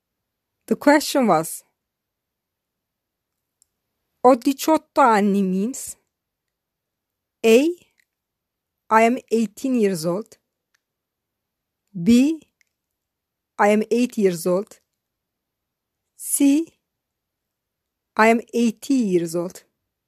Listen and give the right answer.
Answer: The correct answer is A. I am 18 years old.